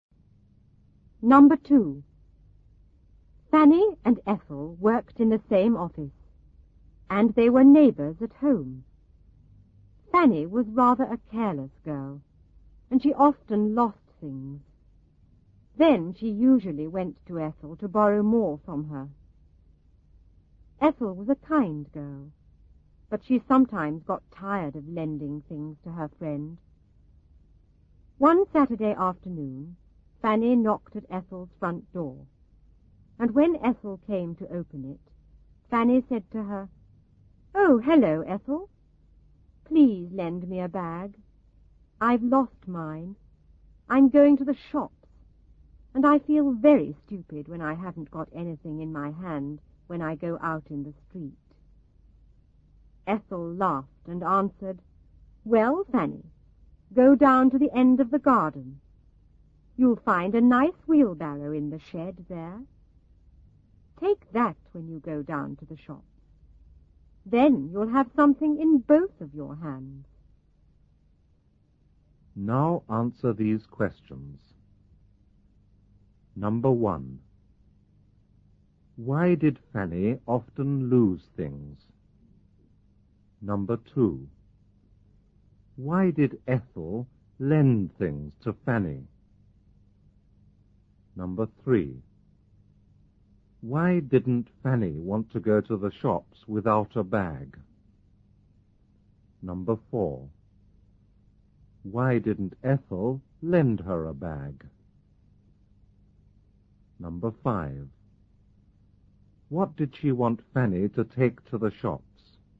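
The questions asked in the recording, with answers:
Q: Why did Fanny often lose things?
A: Because she was rather a careless girl.

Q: Why did Ethel lend things to Fanny?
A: Because she was a kind girl (and her friend and neighbor).

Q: Why didn't Fanny want to go to the shops without a bag?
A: She felt very stupid with nothing in her hand in the street.

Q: What did she want Fanny to take to the shops?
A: A wheelbarrow from the shed.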